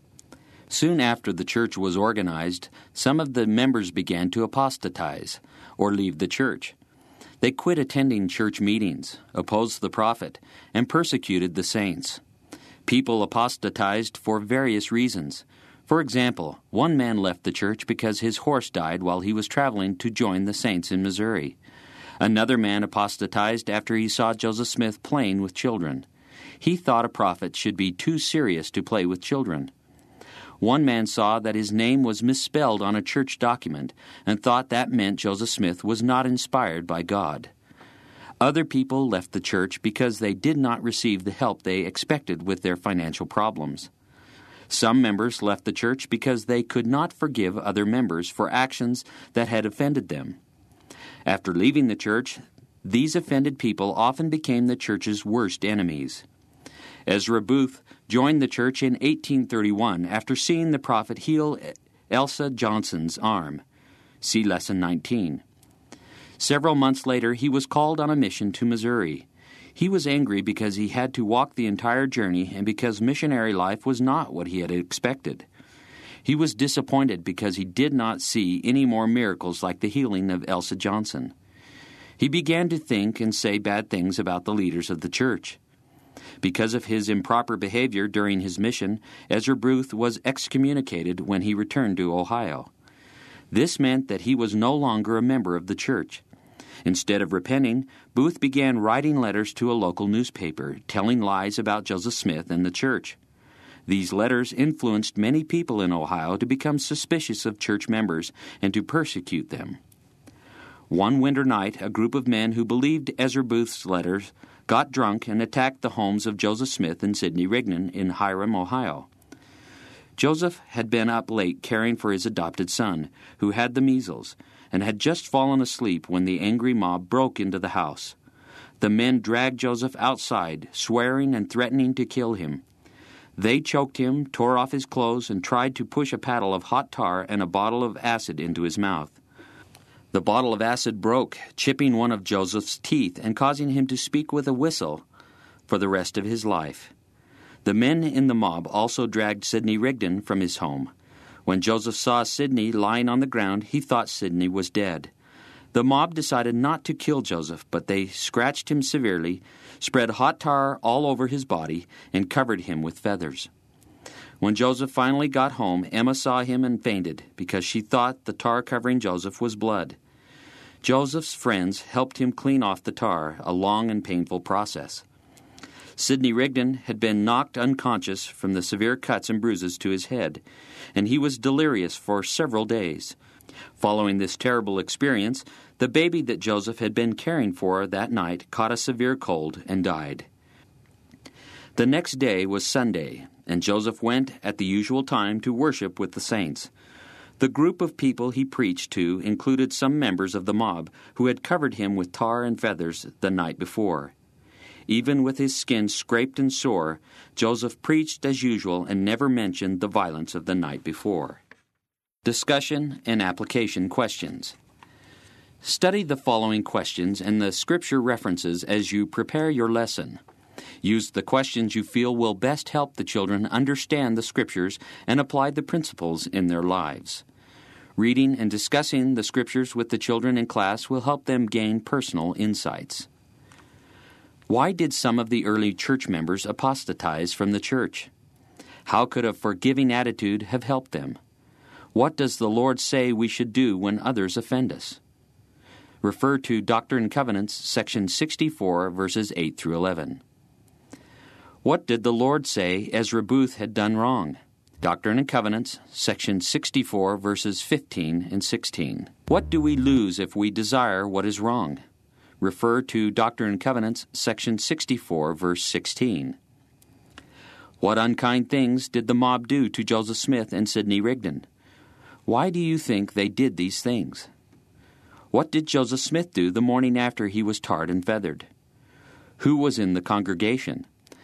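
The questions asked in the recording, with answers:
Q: Why did some of the early church members apostatize from the church?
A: For reasons such as a horse dying, a misspelled name, money problems, or not forgiving offenses by other members

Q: What unkind things did the mob do to Joseph Smith and Sidney Rigdon?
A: They dragged them outside, choked and scratched Joseph, put hot tar and feathers on him, and beat Sidney unconscious

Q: What did Joseph Smith do the morning after he was tarred and feathered?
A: He went to worship with the saints and preached as usual

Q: Who was in the congregation?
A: Some members of the mob who had tarred and feathered him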